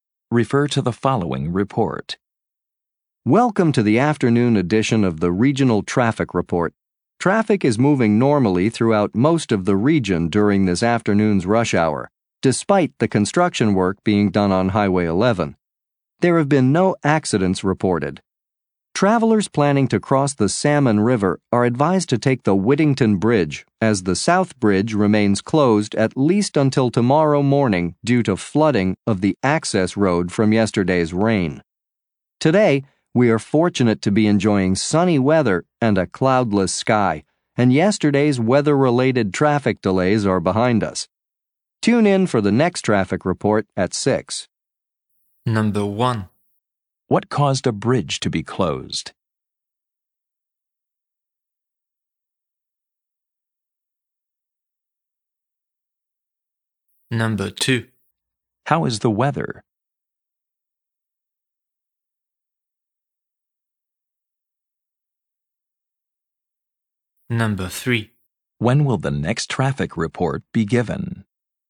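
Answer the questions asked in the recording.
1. Flooding of the access road
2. Sunny and cloudless
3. At 6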